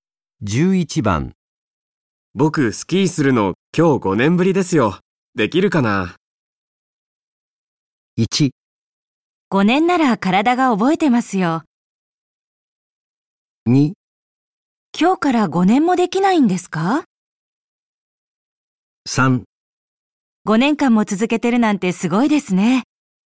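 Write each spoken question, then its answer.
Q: 僕スキーするの今日5年ぶりですよ。できるかな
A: 1: 5年なら体が覚えてますよ。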